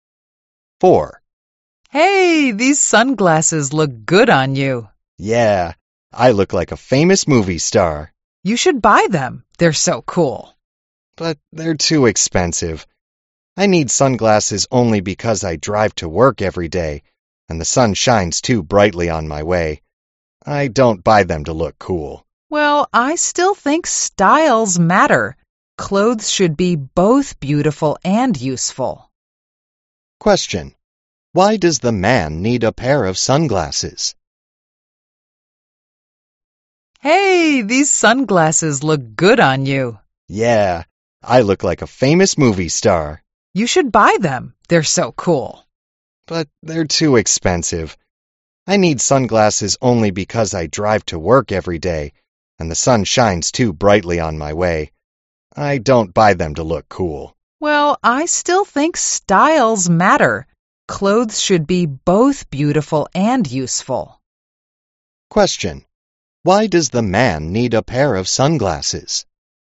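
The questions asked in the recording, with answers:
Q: Why does the man need a pair of sunglasses?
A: Because he drives to work every day and the sun shines too brightly on his way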